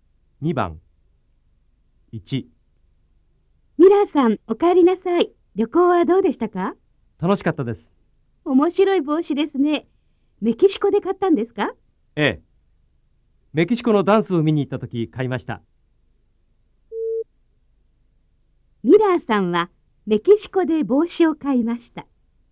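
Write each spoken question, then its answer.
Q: ミラーさんはメキシコで帽子を買いました。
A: 正しい(○)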